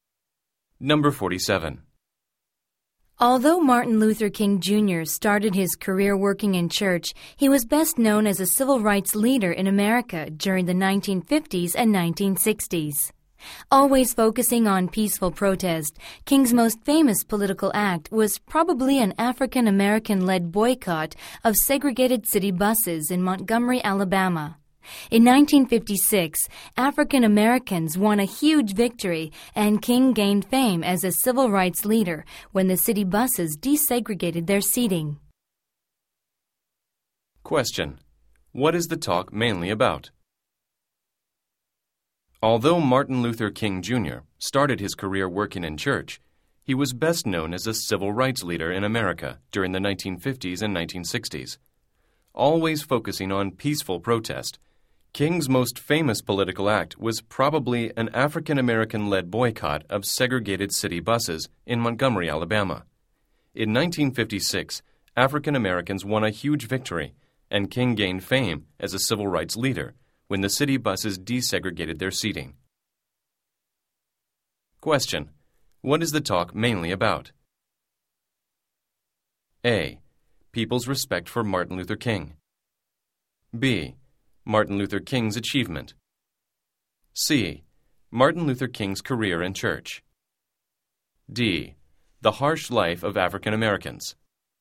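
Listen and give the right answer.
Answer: B: Martin Luther King's achievement.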